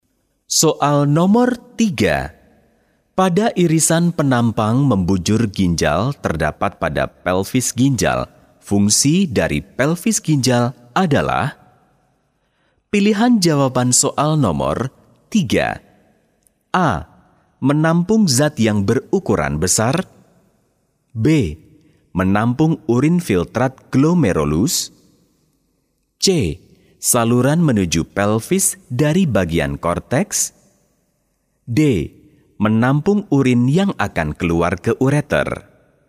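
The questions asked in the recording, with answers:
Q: Fungsi dari pelvis ginjal adalah?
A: D: Menampung urin yang akan keluar ke ureter.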